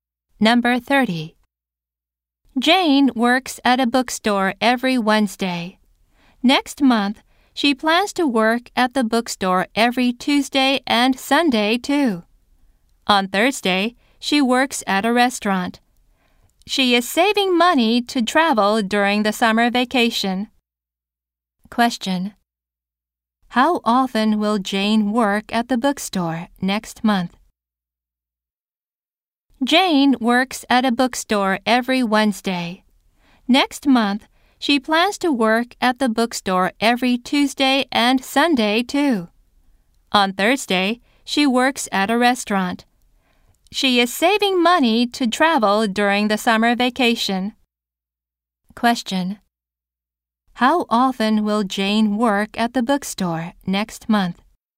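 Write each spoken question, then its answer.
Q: How often will Jane work at the bookstore next month?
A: Three times a week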